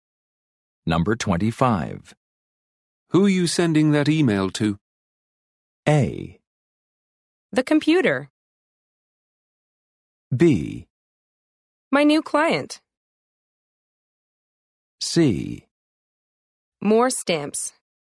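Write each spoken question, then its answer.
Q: Who are you sending that email to?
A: B: My new client.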